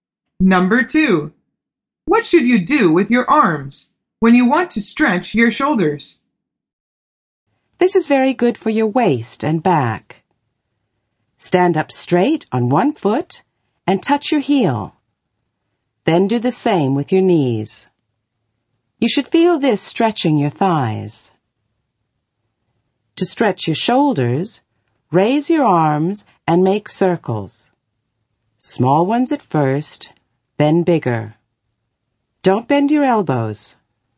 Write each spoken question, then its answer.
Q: What should you do with your arms when you want to stretch your shoulders?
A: The answer is make circles.